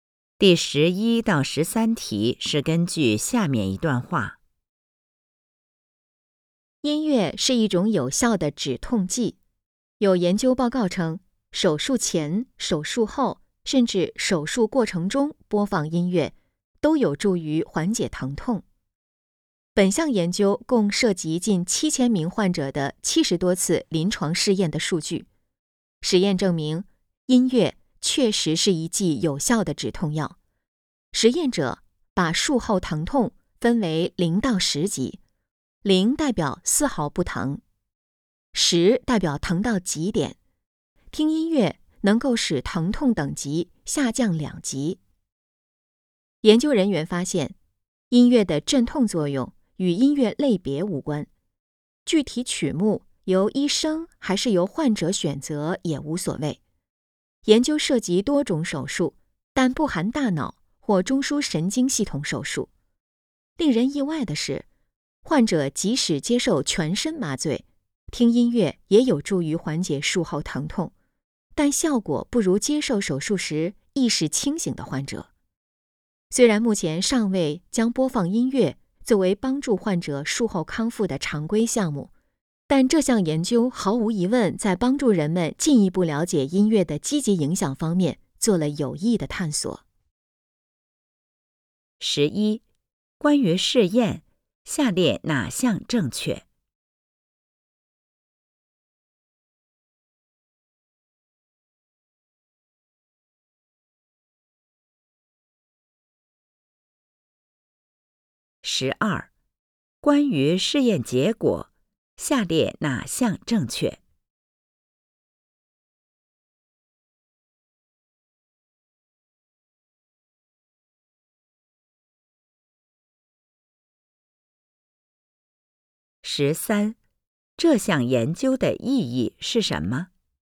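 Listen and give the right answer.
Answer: 有助于人们进一步了解音乐的积极影响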